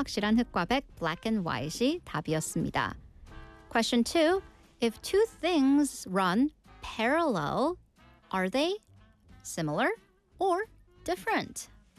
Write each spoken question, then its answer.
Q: If two things run parallel, are they similar or different?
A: Of course, in English, when things are parallel, they are similar.